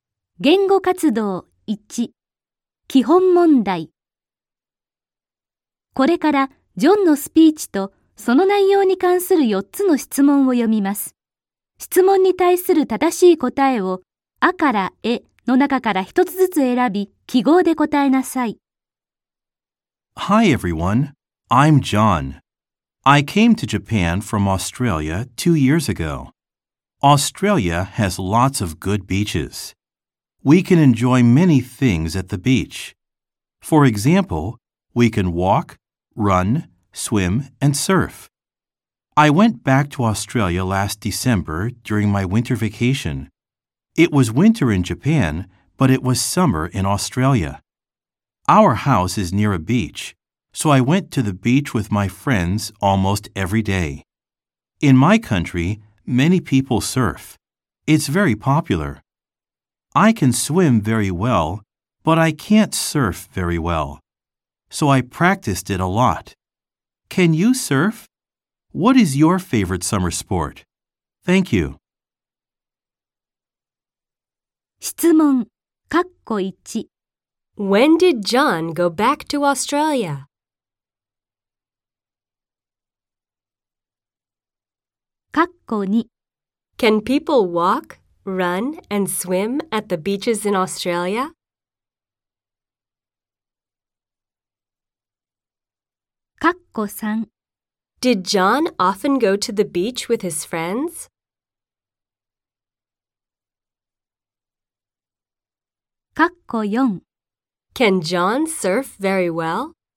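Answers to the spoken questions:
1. Last December, during his winter vacation
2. Yes, they can.
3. Yes, he did.
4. No, he can't.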